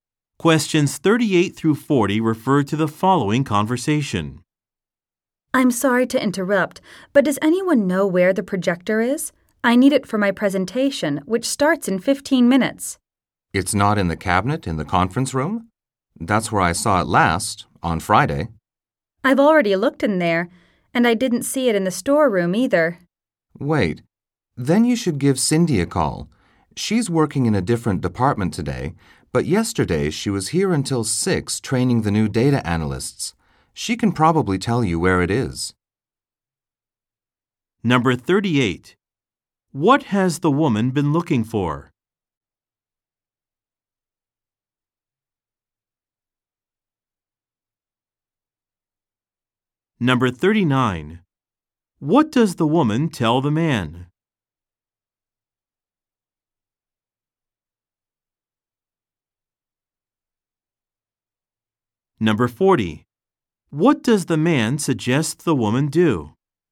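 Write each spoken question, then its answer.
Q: What has the woman been looking for?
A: A projector

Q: What does the man suggest the woman do?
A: Call Cindy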